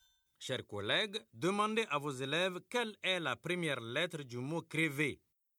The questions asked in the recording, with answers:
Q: Chers collègues, demandez à vos élèves quelle est la première lettre du mot crevé.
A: C'est C.